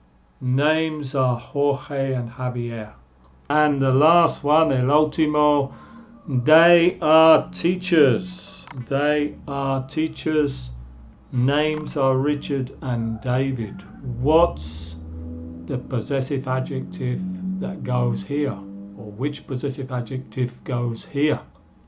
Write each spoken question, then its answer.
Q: Or which possessive adjective goes here?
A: they are teachers, their names are Richard and David.